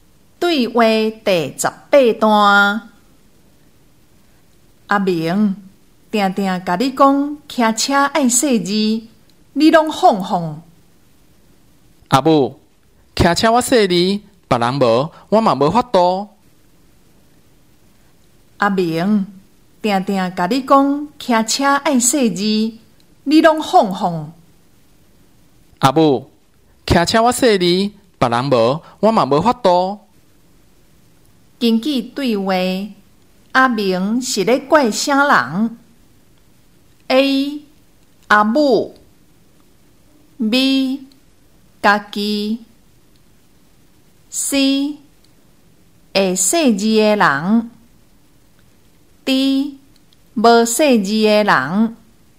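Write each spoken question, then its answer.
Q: 根据对话,阿明是在怪什么人?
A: D: 无细字的人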